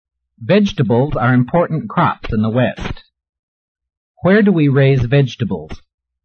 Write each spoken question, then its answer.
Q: Where do we raise vegetables?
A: We raise many vegetables in the West.